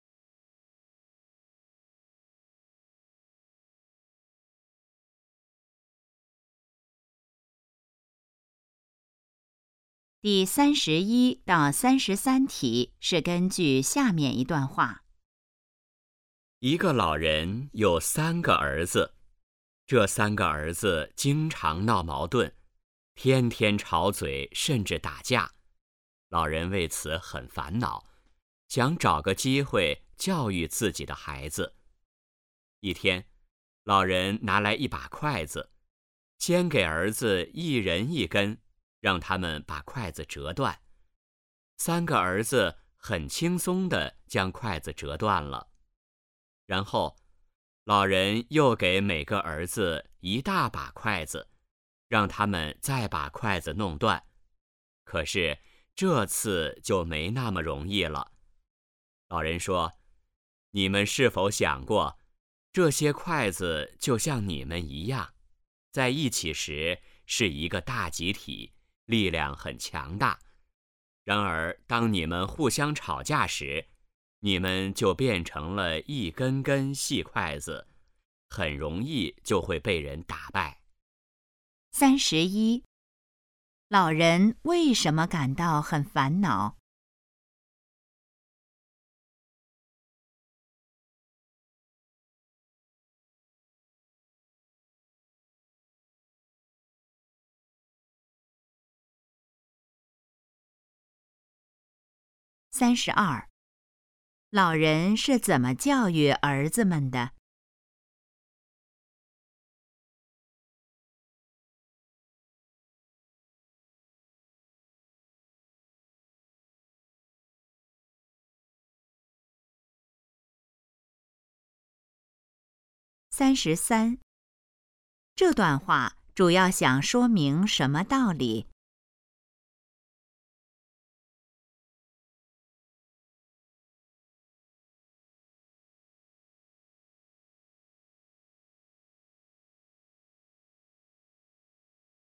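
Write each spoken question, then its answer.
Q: 老人为什么感到很烦恼?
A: 三个儿子经常闹矛盾

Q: 老人是怎么教育儿子们的?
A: 让他们折筷子

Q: 这段话主要想说明什么道理?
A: 团结力量大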